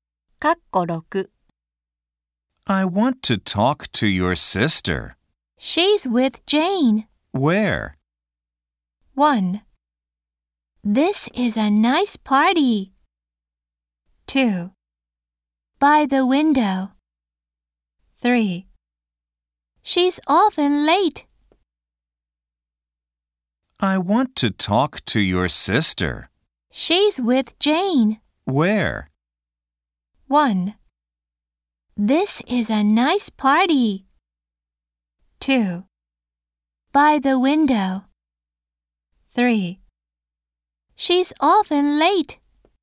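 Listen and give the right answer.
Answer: 2: By the window.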